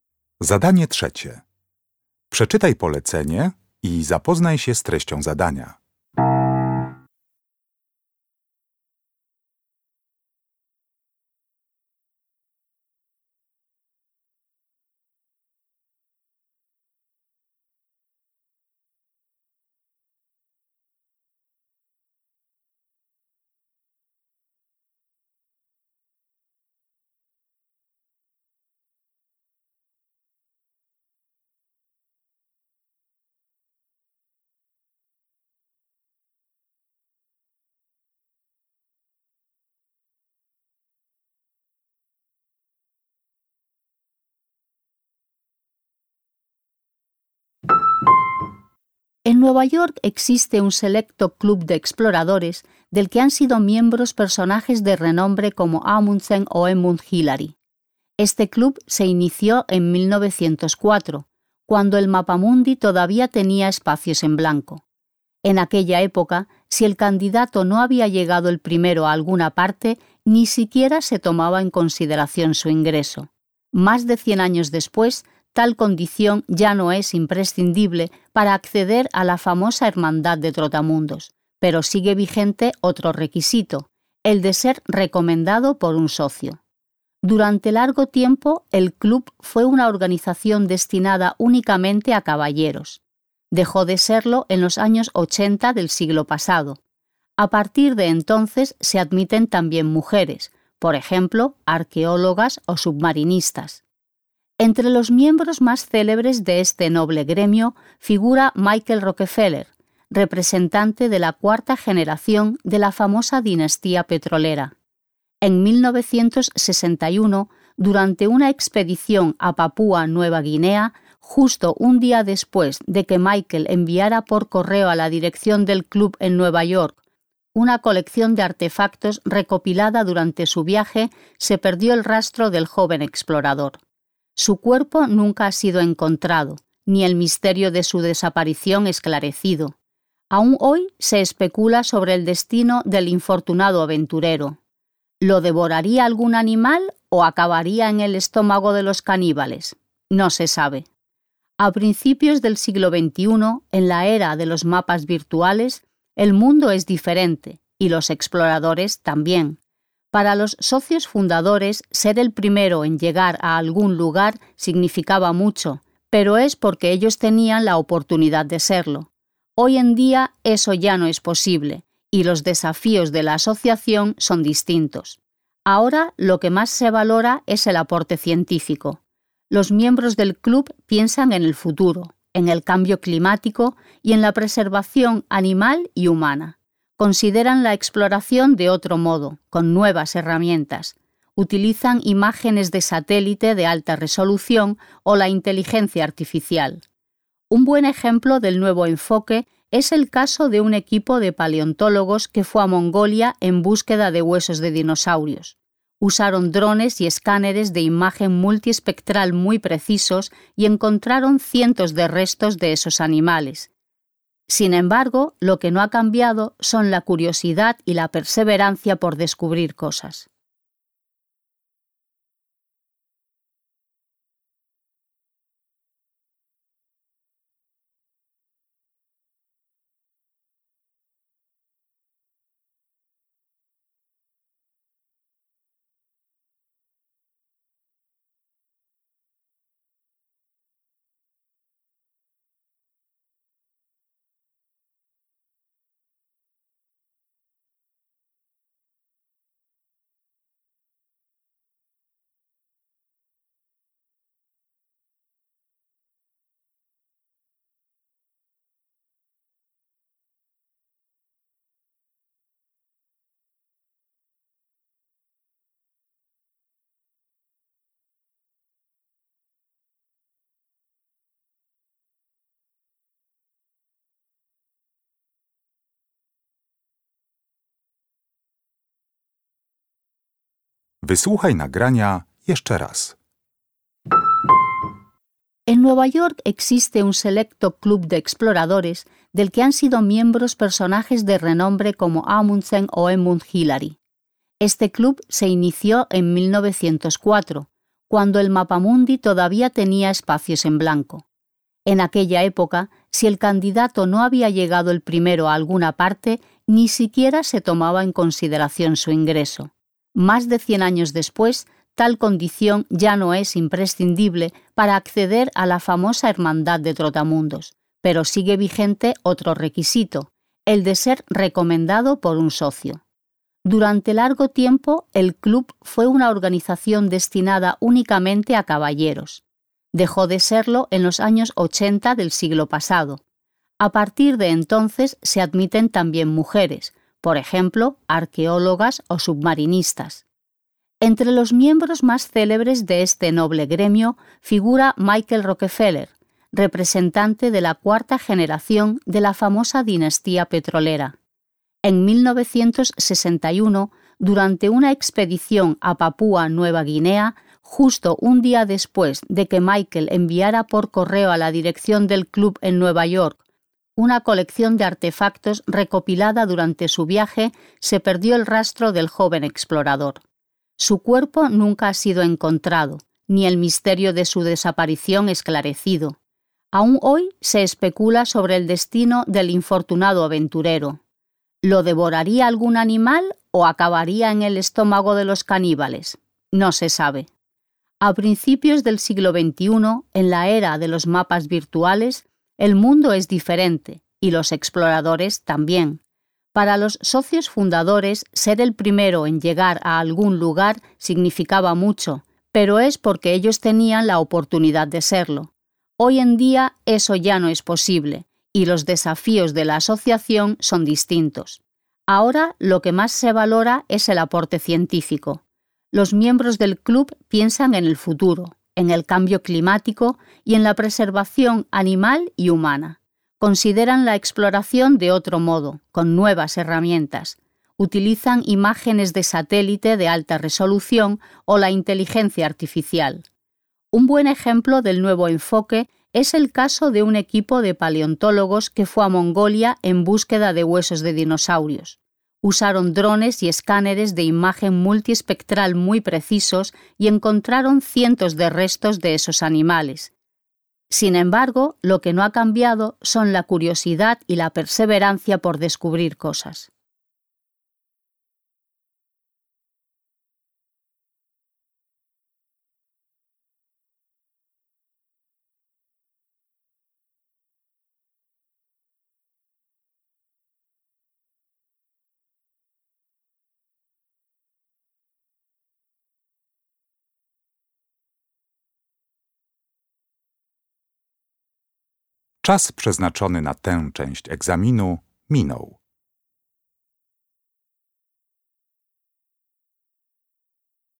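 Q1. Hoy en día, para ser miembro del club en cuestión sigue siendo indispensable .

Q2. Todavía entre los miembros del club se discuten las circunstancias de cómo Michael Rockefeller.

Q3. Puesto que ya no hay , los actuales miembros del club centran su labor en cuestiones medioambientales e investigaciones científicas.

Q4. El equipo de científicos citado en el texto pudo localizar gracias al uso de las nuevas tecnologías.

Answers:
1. ser recomendado por un socio
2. desapareció / murió
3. lugares a los que llegar el primero
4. cientos de restos de dinosaurios

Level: Poziom: rozszerzony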